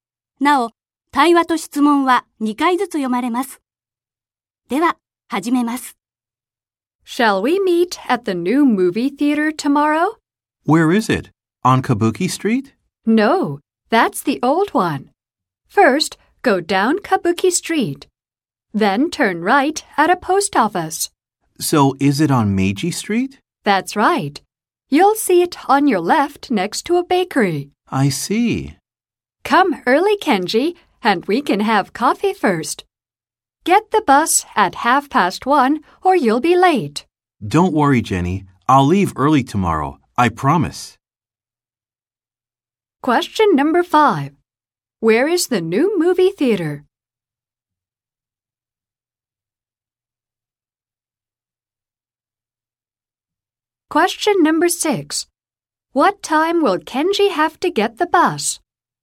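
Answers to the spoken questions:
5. On Meiji Street, next to a bakery
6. At 1:30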